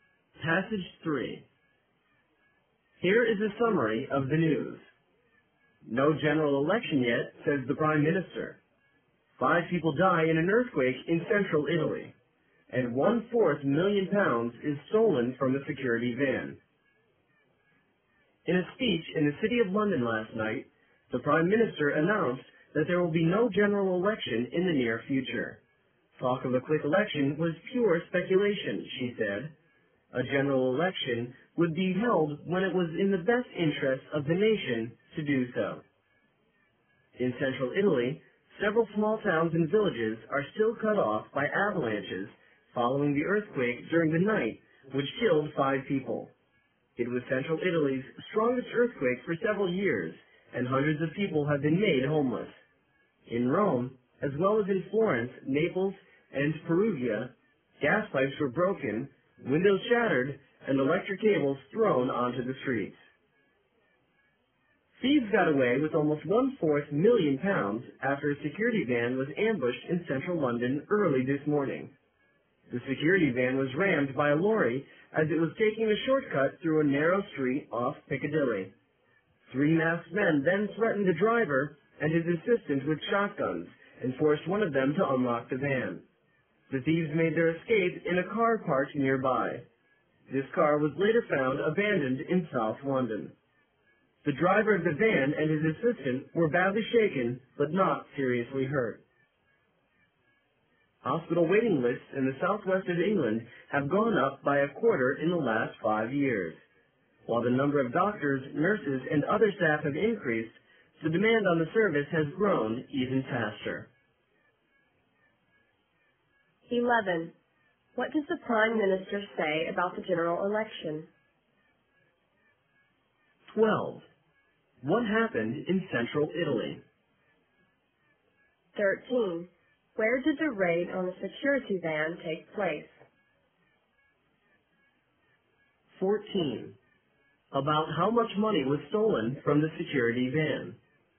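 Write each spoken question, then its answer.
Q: What does the Prime Minister say about the general election?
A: There will be no general election in the near future

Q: What happened in central Italy?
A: An earthquake killed 5 people

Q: Where did the raid on the security van take place?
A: In central London, a narrow street off Piccadilly

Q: about how much money was stolen from the security van.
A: Almost 1/4 million pounds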